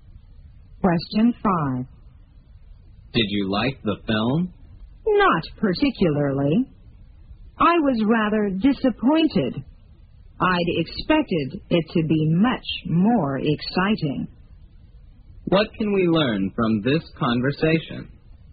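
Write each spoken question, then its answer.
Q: What can we learn from this conversation?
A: The speaker was disappointed; the film was less exciting than expected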